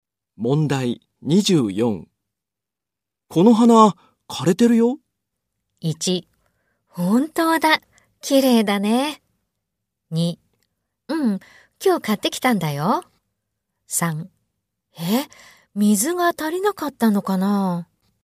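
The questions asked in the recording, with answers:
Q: この花、枯れてるよ。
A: 2: え、水が足りなかったのかな。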